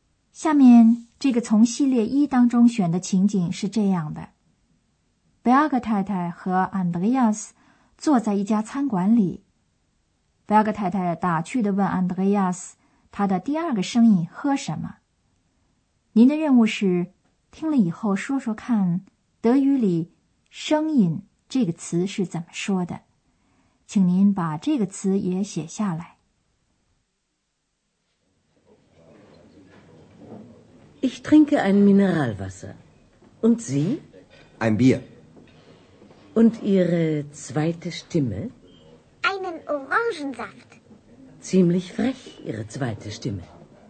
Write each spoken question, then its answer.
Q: 您的任务是听了以后说说看德语里声音这个词是怎么说的。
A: 找的第四个词是德语中声音这个词,它是 Stimme